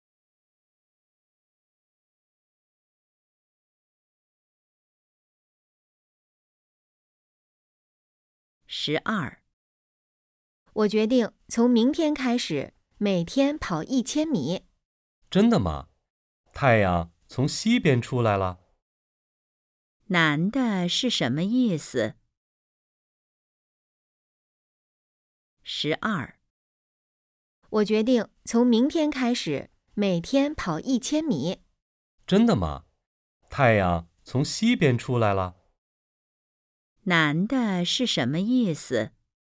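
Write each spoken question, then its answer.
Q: 男的是什么意思?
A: 不相信女的会每天跑步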